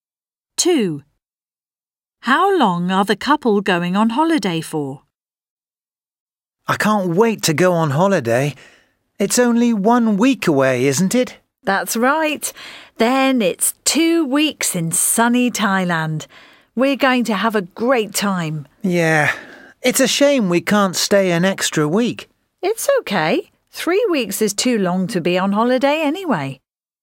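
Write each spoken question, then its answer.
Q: How long are the couple going on holiday for?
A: 2 weeks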